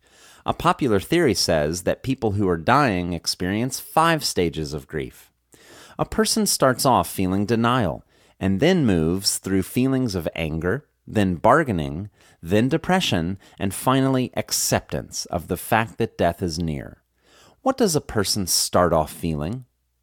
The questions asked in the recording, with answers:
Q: What does a person start off feeling?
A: A person starts off feeling denial.